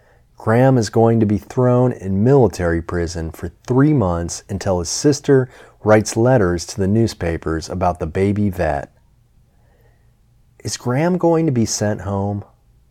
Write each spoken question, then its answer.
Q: Is Graham going to be sent home?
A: No, Graham isn't going to be sent home.